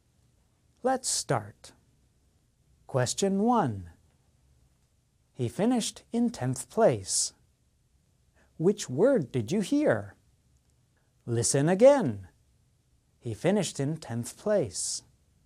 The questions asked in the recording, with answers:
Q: Which word did you hear?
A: The answer is 10th.